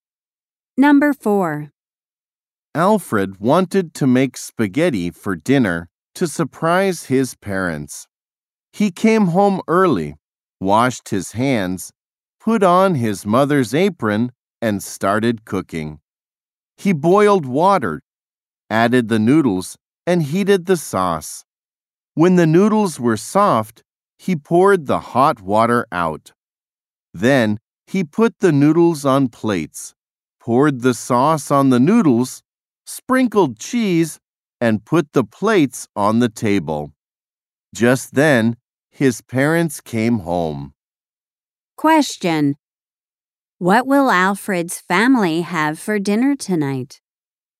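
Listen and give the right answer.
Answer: Spaghetti.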